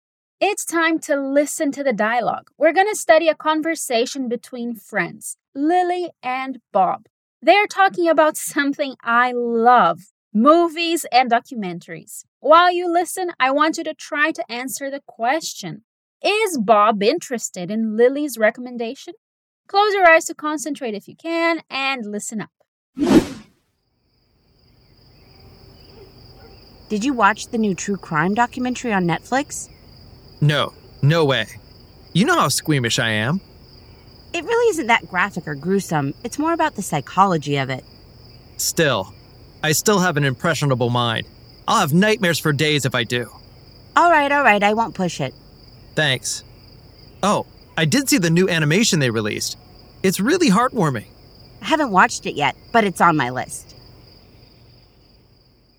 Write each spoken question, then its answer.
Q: Is Bob interested in Lily's recommendation?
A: Okay, so he is not very interested in this recommendation.